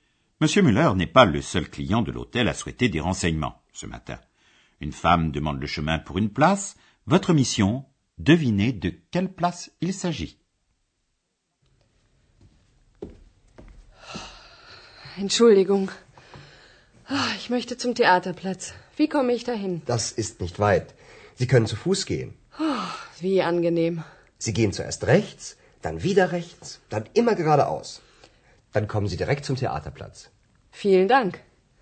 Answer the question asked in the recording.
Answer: La place que la femme cherche est la place du théâtre.